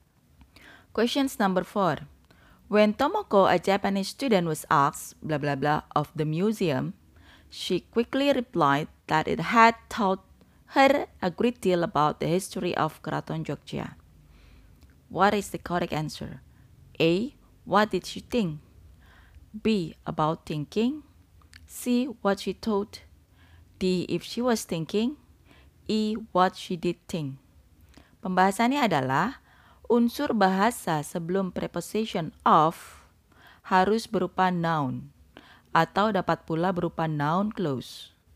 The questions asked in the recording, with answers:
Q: What is the correct answer?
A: So the correct answer is C.